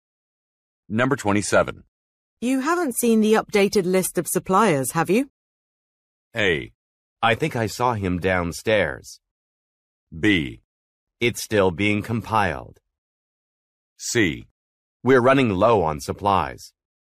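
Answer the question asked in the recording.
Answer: B: It's still being compiled.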